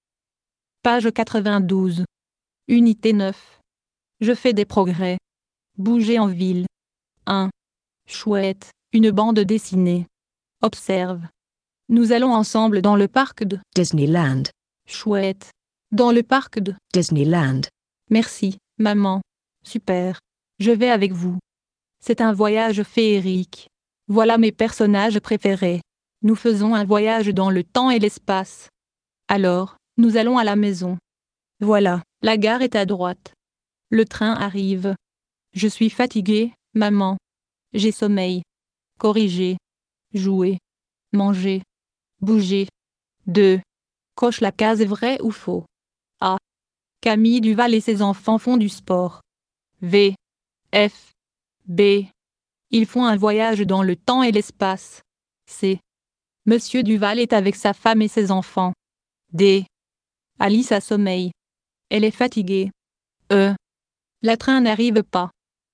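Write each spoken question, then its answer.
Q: Camille Duval et ses enfants font du sport.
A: Faux

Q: Ils font un voyage dans le temps et l'espace.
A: Vrai

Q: La train n'arrive pas.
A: Faux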